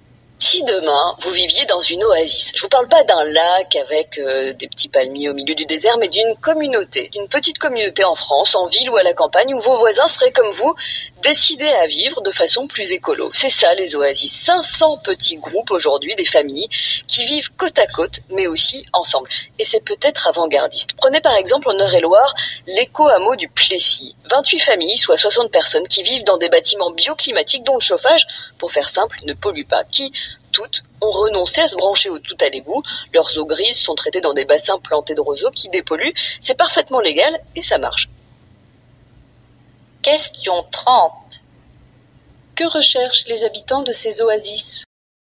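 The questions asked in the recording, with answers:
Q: Que recherchent les habitants de ces oasis ?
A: Vivre de façon plus écologique, en communauté avec des voisins qui partagent ce choix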